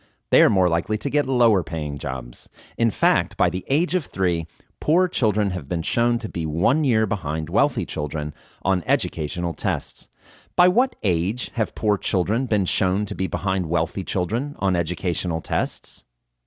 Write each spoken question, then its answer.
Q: By what age have poor children been shown to be behind wealthy children on educational tests?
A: By the age of 3, poor children have been shown to be behind wealthy children on educational tests.